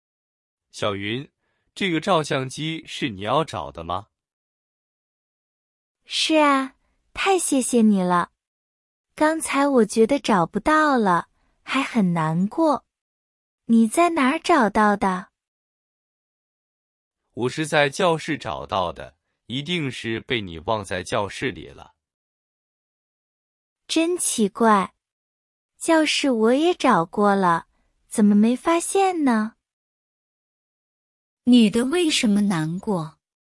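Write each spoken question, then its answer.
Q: 女的为什么难过?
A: 她以为照相机找不到了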